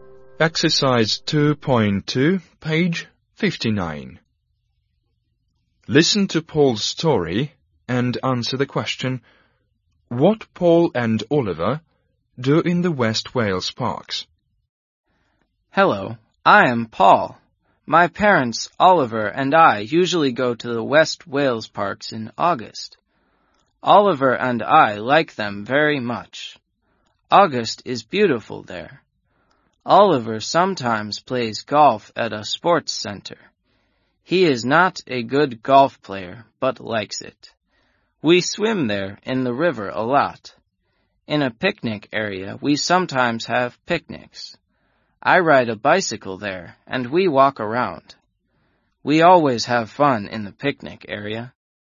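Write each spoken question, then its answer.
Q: what Paul and Oliver do in the West Wales parks?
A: They swim in the river, have picnics, ride bicycles and walk around; Oliver sometimes plays golf.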